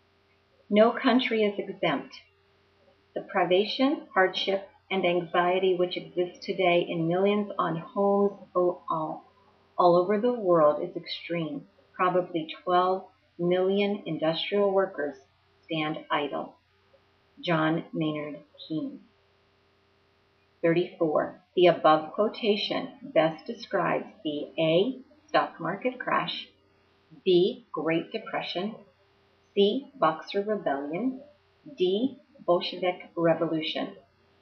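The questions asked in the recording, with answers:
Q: The above quotation best describes the A.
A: B: Great Depression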